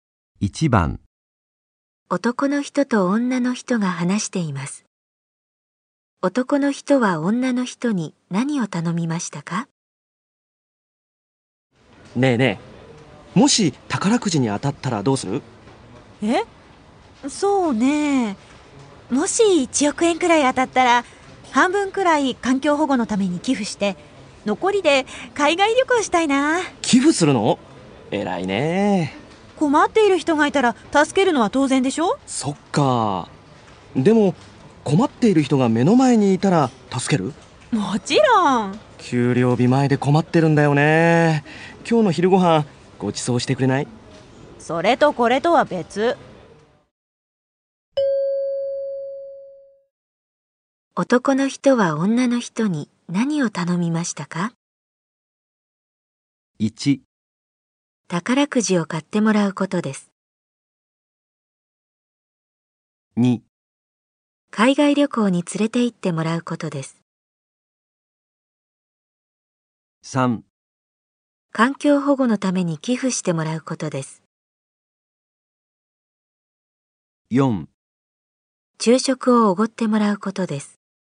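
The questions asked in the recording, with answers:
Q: 男の人は女の人に何を頼みましたか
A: 4: 昼食をおごってもらうことです。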